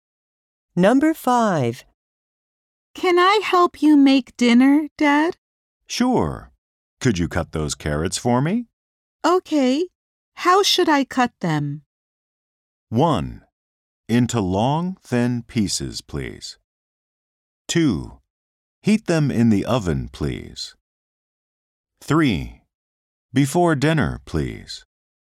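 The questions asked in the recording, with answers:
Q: Okay. How should I cut them?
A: 1: Into long, thin pieces, please.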